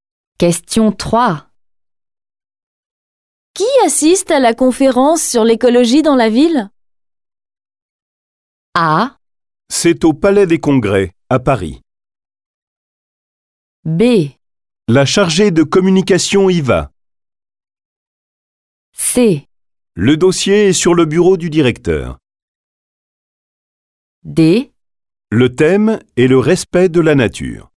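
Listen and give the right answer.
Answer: B: La chargée de communication y va.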